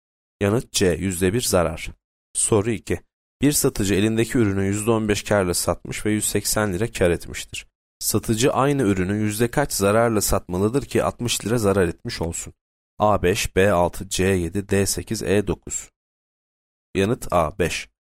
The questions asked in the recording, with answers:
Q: Satıcı aynı ürünü yüzde kaç zararla satmalıdır ki 60 lira zarar etmiş olsun?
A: A 5.